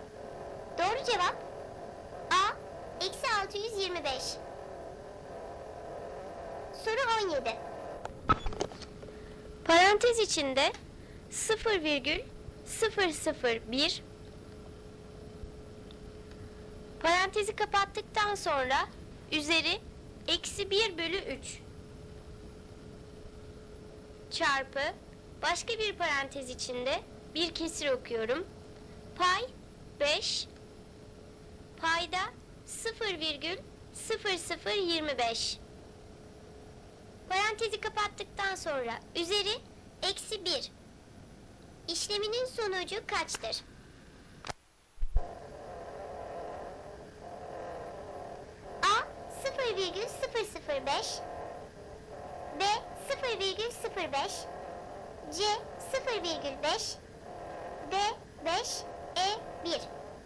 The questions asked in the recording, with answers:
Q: İşleminin sonucu kaçtır?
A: Doğru cevap 0,005.